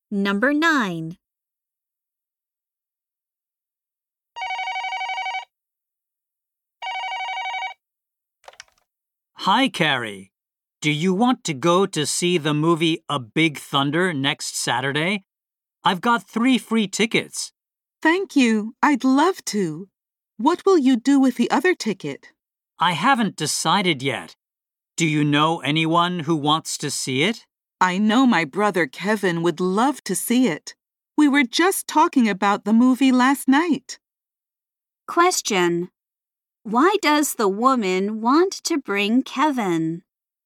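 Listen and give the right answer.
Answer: Kevin would love to see the movie; they talked about it last night.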